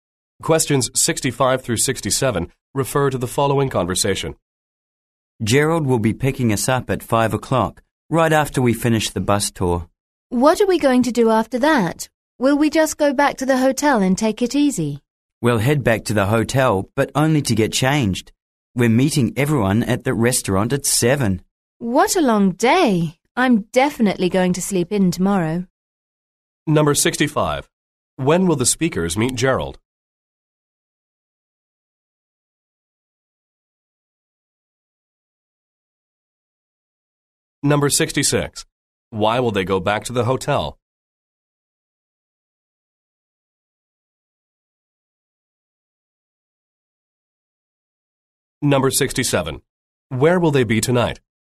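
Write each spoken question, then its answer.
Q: When will the speakers meet Gerald?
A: At 5 o'clock, after the bus tour

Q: Why will they go back to the hotel?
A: To get changed

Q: Where will they be tonight?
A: At a restaurant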